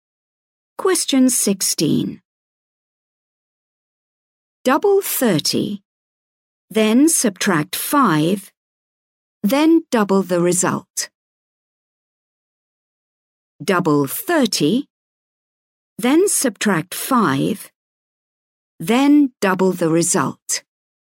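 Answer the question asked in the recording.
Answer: 110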